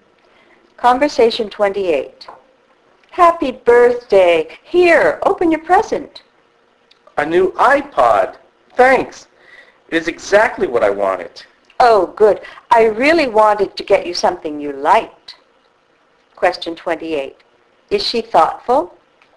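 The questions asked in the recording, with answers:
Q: Is she thoughtful?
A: Yes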